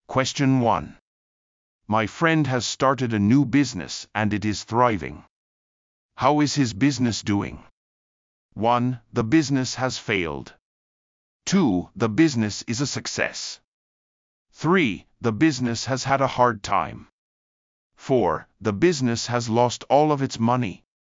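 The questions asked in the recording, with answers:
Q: How is his business doing?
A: 2: The business is a success.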